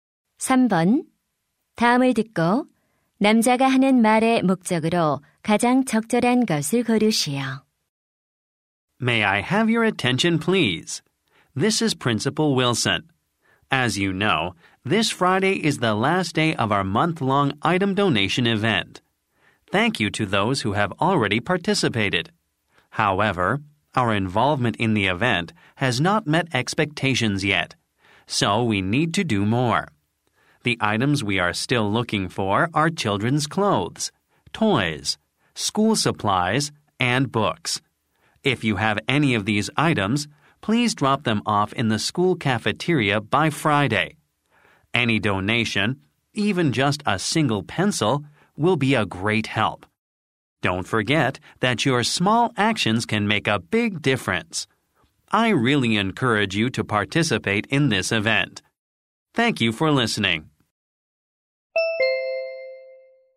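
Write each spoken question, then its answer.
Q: 다음을 듣고 남자가 하는 말의 목적으로 가장 적절한 것을 고르시오.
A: 물품 기부 행사 참여를 독려하려고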